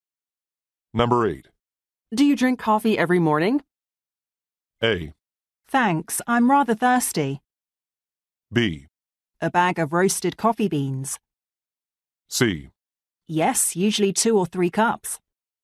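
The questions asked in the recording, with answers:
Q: Do you drink coffee every morning?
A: C: Yes, usually 2 or 3 cups.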